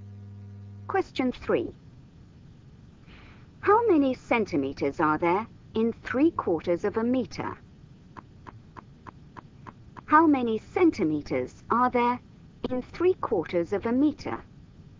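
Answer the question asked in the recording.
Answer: 75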